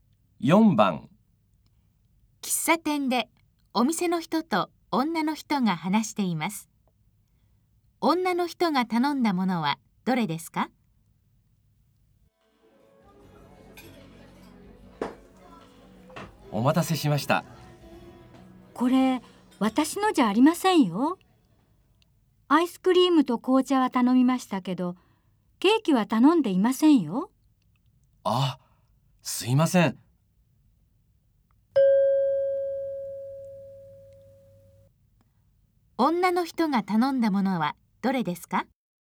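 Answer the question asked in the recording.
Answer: アイスクリームと紅茶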